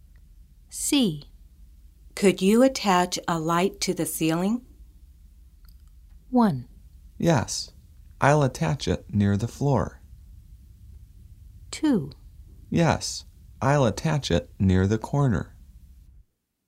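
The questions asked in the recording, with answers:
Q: Could you attach a light to the ceiling?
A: 2: Yes. I'll attach it near the corner.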